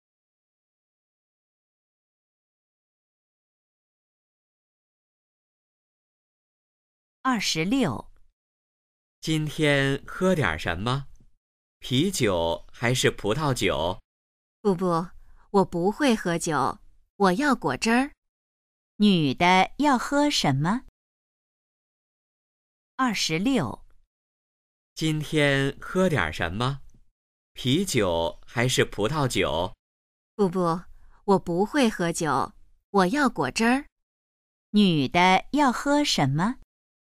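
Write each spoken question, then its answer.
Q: 女的要喝什么?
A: 果汁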